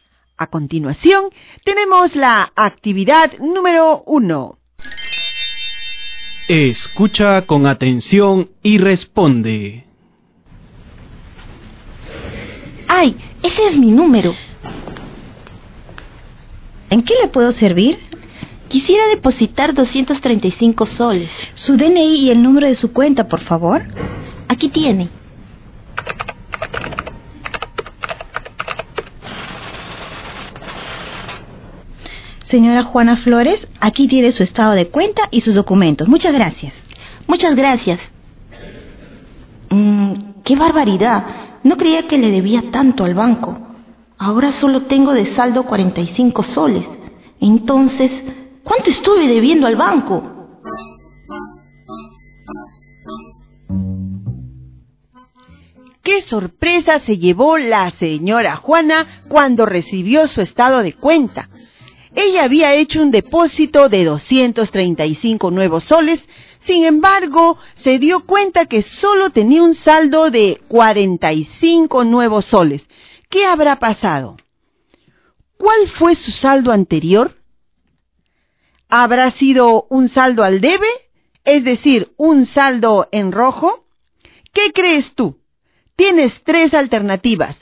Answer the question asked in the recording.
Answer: Lo que quiere decir que la señora Juana debía al banco 190 nuevos soles.